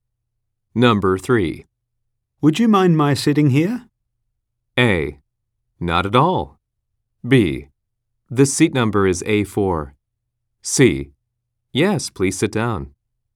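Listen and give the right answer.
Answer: A: Not at all.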